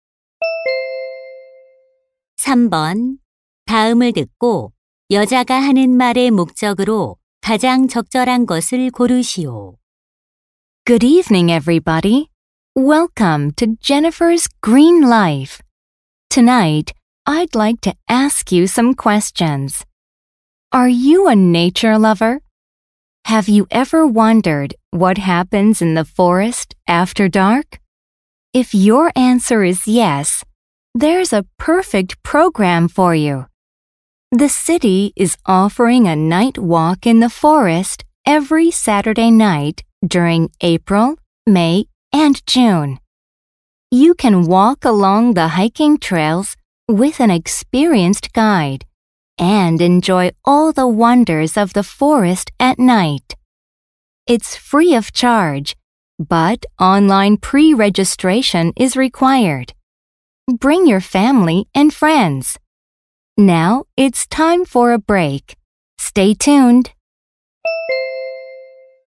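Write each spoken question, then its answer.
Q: 다음을 듣고 여자가 하는 말의 목적으로 가장 적절한 것을 고르시오.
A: 야간 숲 걷기 프로그램을 홍보하려고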